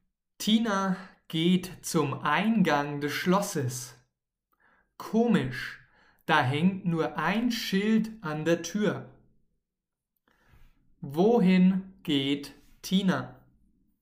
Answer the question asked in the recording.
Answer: Zum Eingang des Schlosses.